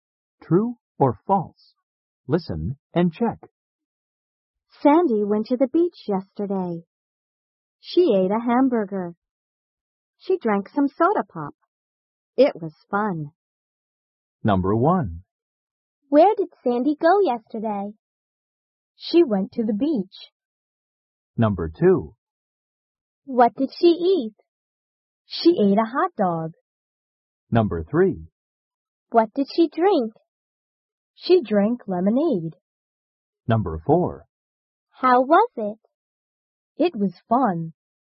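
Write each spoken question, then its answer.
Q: Where did Sandy go yesterday?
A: True (she went to the beach)

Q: What did she eat?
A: False (she ate a hamburger)

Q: What did she drink?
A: False (she drank some soda pop)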